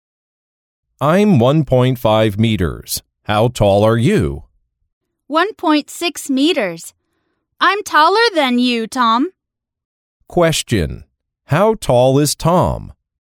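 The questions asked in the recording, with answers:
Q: How tall is Tom?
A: 1.5 meters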